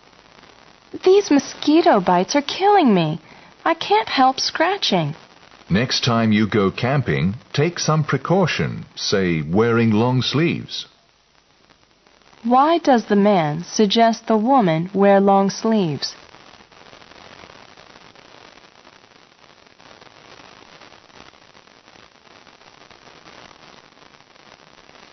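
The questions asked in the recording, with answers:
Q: Why does the man suggest the woman wear long sleeves?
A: To protect herself from mosquito bites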